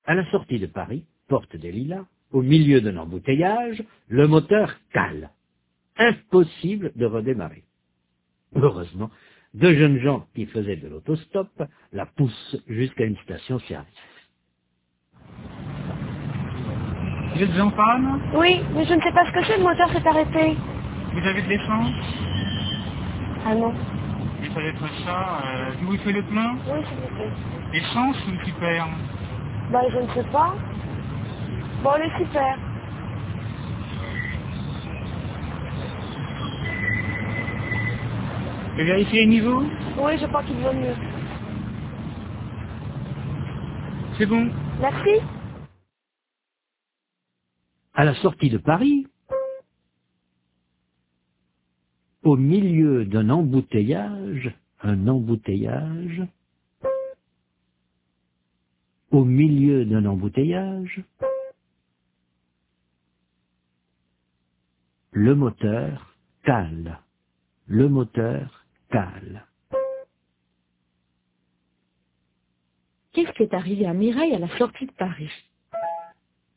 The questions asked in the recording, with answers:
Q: Qu'est-ce qui est arrivé à Mireille à la sortie de Paris ?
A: Le moteur a calé.